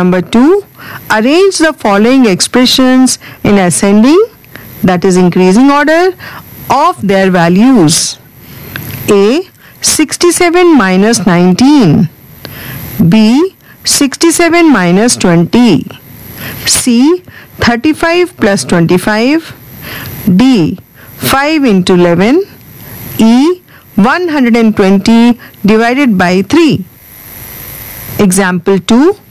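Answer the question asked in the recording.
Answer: E (40), B (47), A (48), D (55), C (60)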